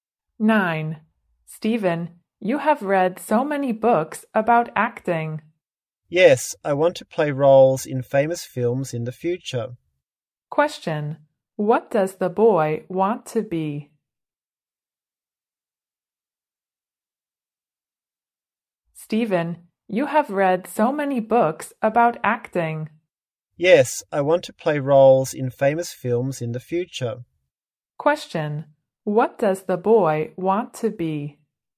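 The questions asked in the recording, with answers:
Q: What does the boy want to be?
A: An actor.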